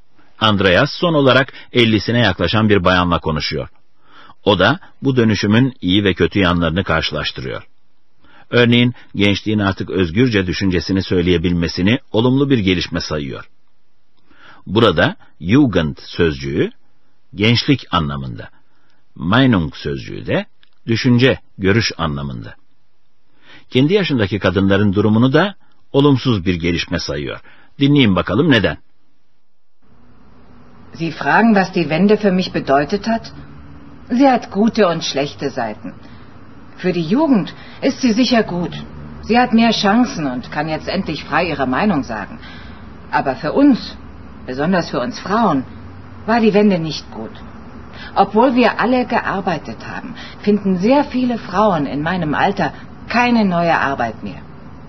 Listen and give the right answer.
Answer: Ama şimdi yaşlanmaya yüz tutanlar artık iş bulamıyorlar.